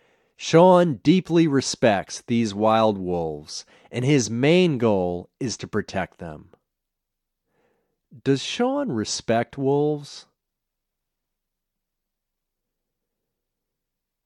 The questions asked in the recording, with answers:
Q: Does Sean respect wolves?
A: Yes, he deeply respects wolves.